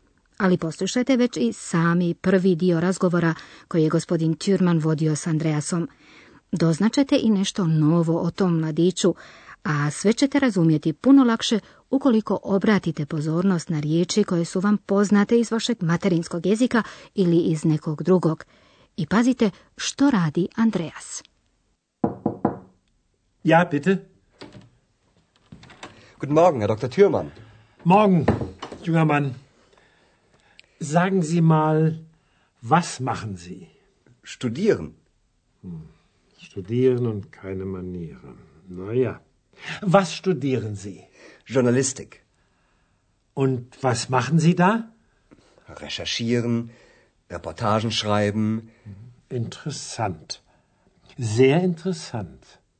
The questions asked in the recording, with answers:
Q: I pazite što radi Andreas.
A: Andreas studira novinarstvo.